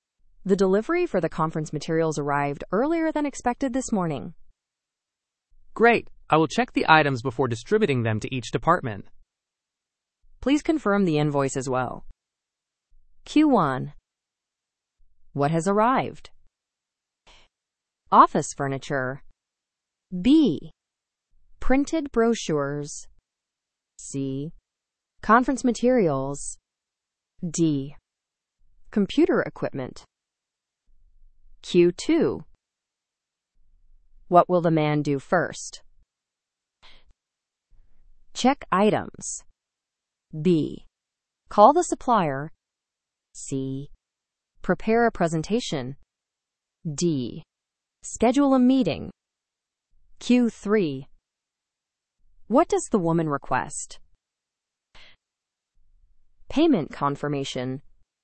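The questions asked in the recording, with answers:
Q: What has arrived?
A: C: Conference materials.

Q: What will the man do first?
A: A: Check items.

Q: What does the woman request?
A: A: Payment confirmation.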